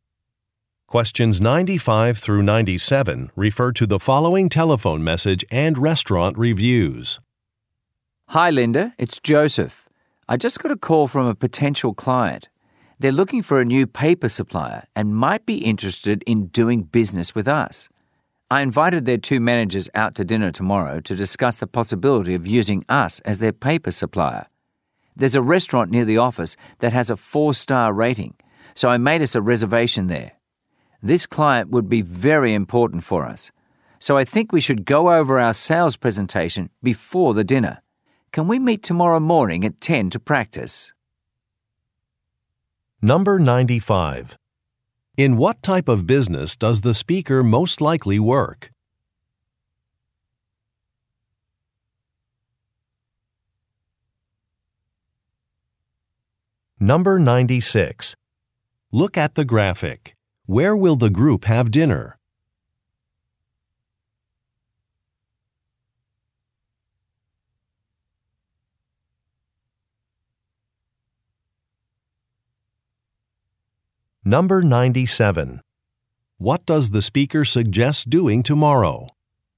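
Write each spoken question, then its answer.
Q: In what type of business does the speaker most likely work?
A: A paper supplier

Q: What does the speaker suggest doing tomorrow?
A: Meeting to practice the sales presentation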